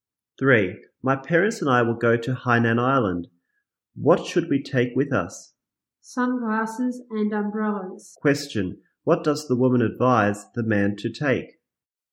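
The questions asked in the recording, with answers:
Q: What does the woman advise the man to take?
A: Sunglasses and umbrellas.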